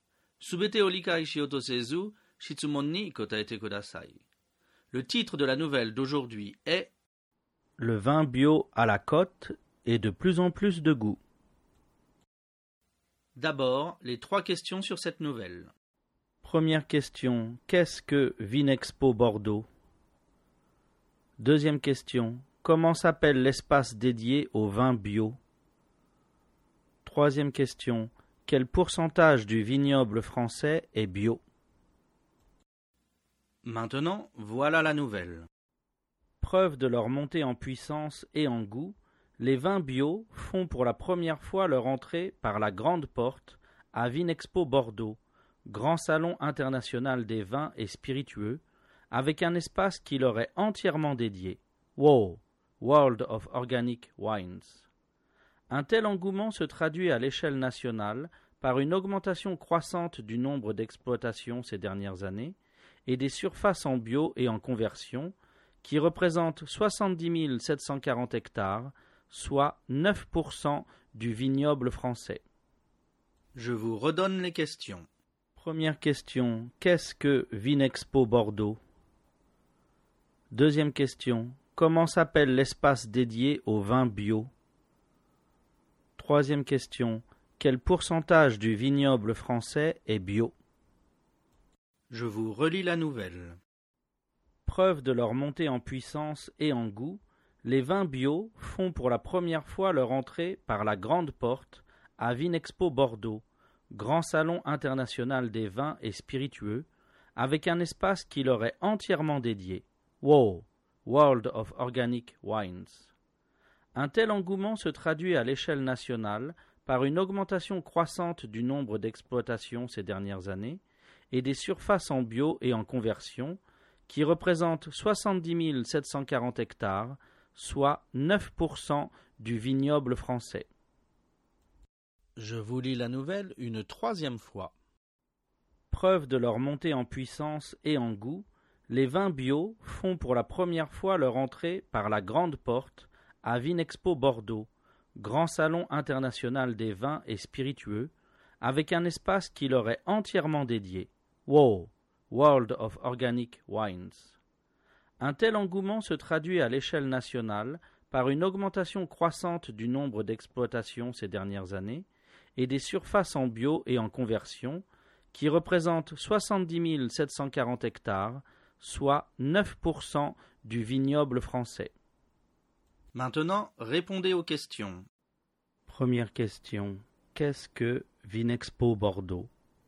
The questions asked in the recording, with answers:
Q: qu'est-ce que Vinexpo Bordeaux?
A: Réponse, Vinexpo Bordeaux est un grand salon international des vins et spiritueux.

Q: comment s'appelle l'espace dédié au vin bio?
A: Réponse, l'espace dédié au vin bio s'appelle WO, World of Organic Wines.

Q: quel pourcentage du vignoble français est bio?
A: Réponse, 9% du vignoble français est bio.